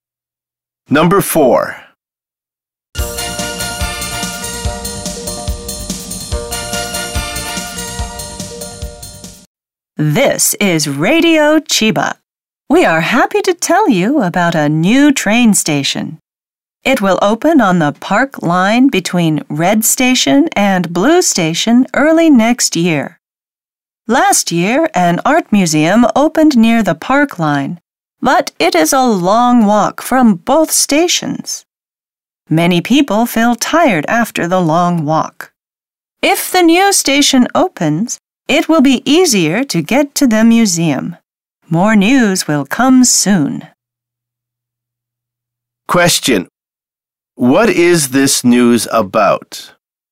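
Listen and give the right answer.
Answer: A new train station opening on the Park Line.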